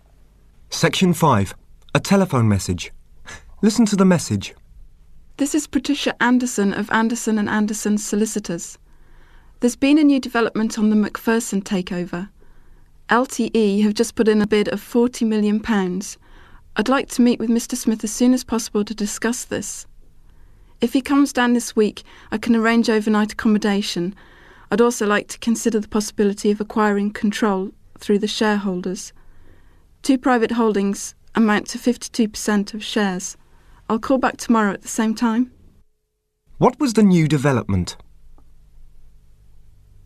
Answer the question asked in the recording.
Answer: LTE offered £40 million for the McPherson company.